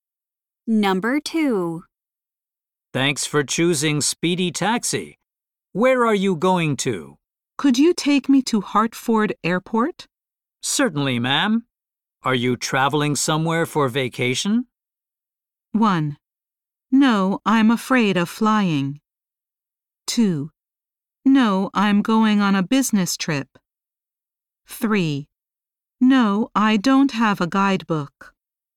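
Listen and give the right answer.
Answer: 2: No, I'm going on a business trip.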